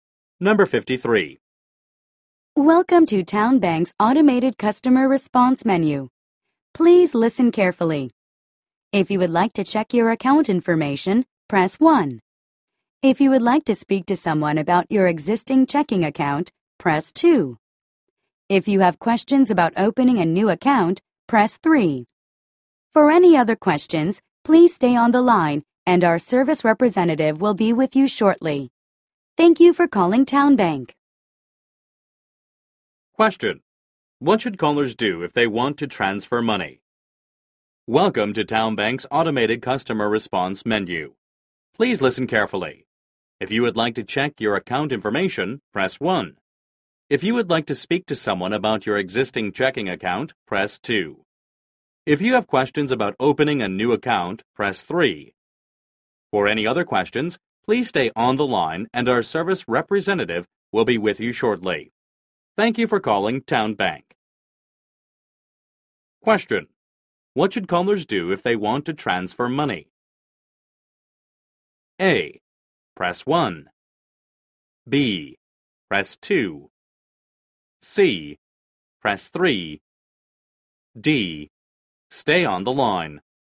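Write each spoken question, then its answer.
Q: What should callers do if they want to transfer money?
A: D: Stay on the line.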